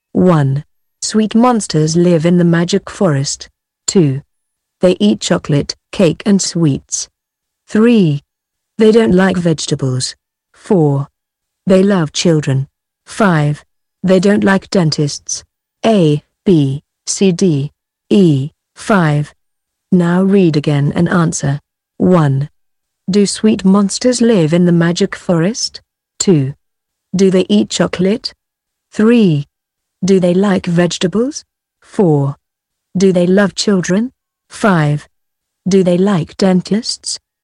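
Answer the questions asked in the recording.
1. Yes, they do.
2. Yes, they do.
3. No, they don't.
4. Yes, they do.
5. No, they don't.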